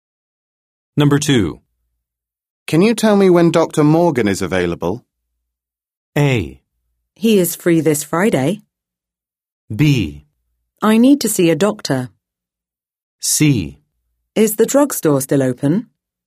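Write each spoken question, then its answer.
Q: Can you tell me when Dr. Morgan is available?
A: A: He is free this Friday.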